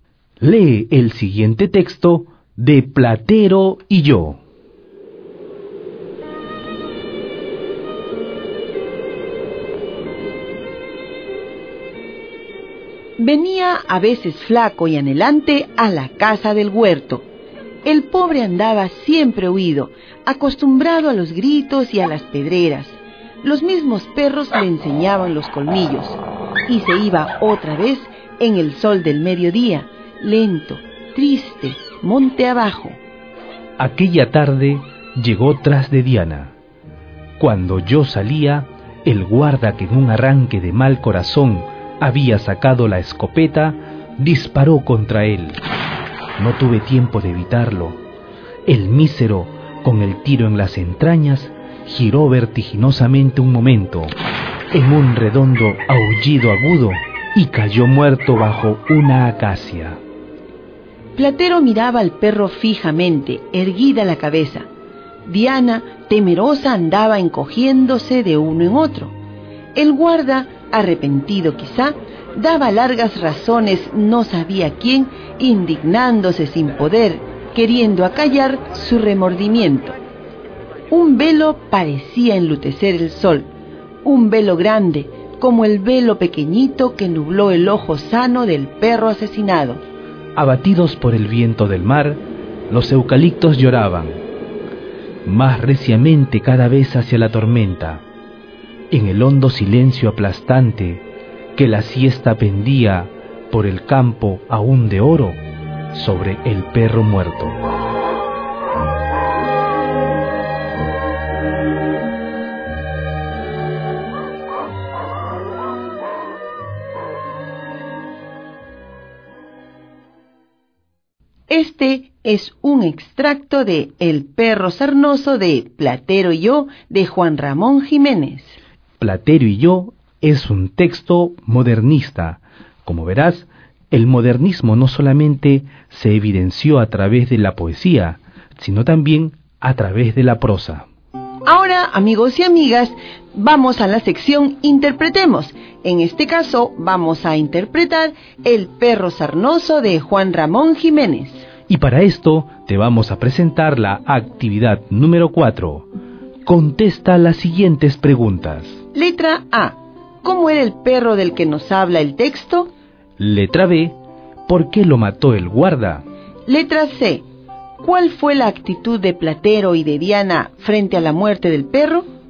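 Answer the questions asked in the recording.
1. Era un perro sarnoso, flaco y anhelante, siempre huido y maltratado
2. En un arranque de mal corazón
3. Platero miraba al perro fijamente, con la cabeza erguida; Diana, temerosa, andaba encogiéndose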